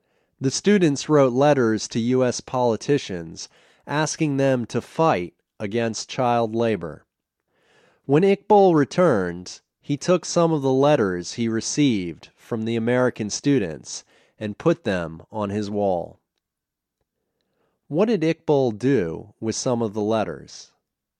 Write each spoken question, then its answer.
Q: What did Iqbal do with some of the letters?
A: He put some of the letters on his wall.